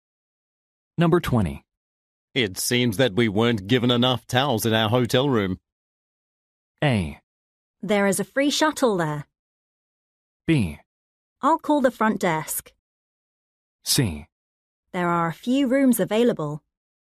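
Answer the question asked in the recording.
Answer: B: I'll call the front desk.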